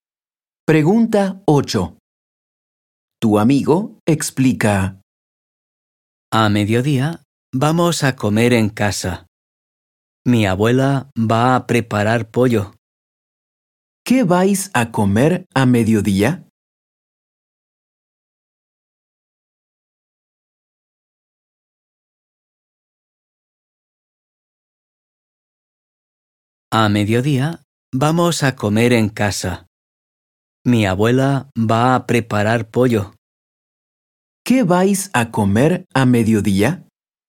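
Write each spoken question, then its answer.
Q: ¿Qué vais a comer a mediodía?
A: Pollo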